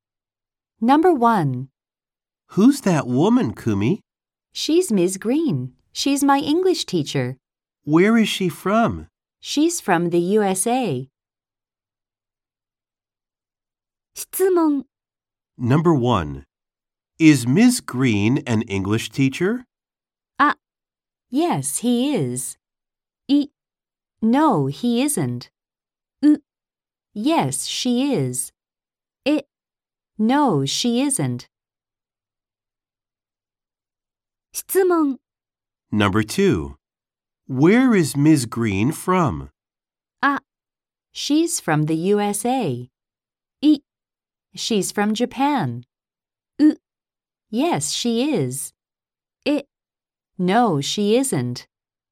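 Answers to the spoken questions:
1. C: Yes, she is.
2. A: She's from the USA.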